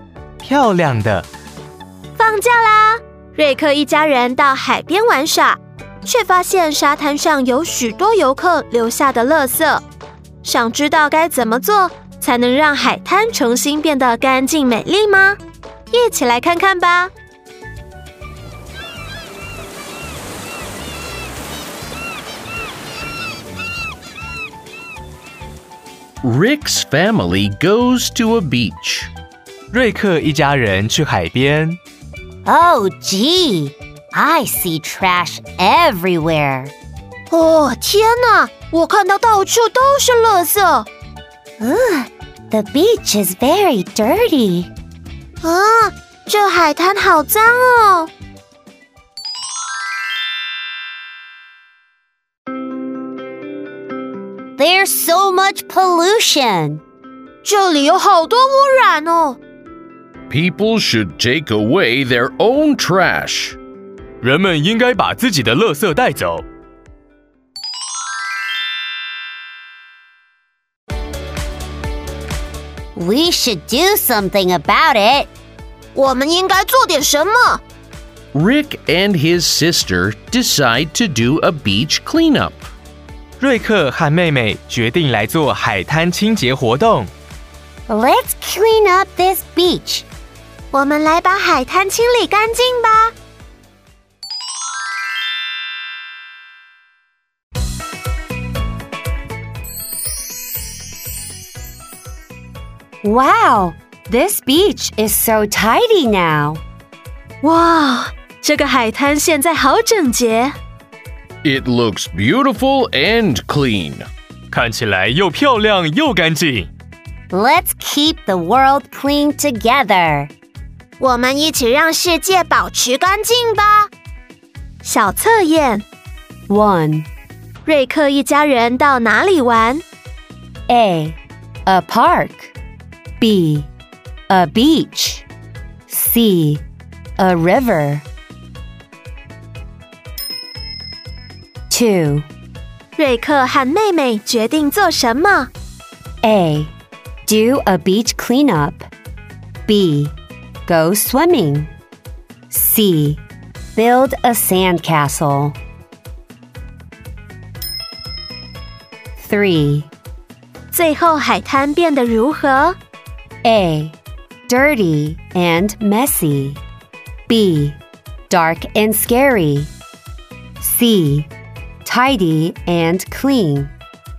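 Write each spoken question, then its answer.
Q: 瑞克一家人到哪里玩?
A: B: A beach.

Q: 瑞克和妹妹决定做什么?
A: A: Do a beach cleanup.

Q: 最后海滩变得如何?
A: C: Tidy and clean.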